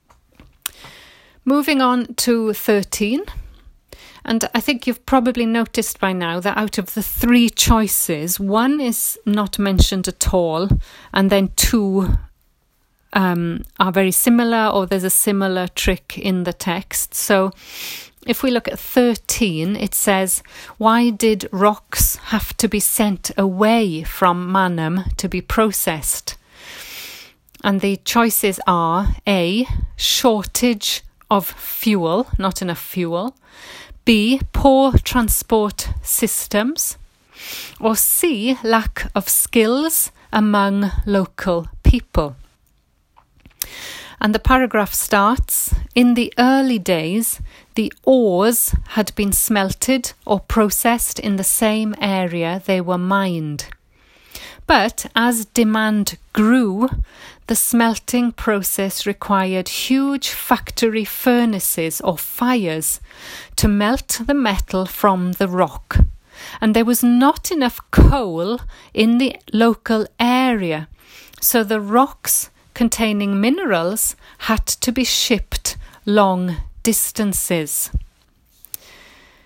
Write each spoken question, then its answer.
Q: why did rocks have to be sent away from Mannheim to be processed?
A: So the answer is A, a shortage of fuel.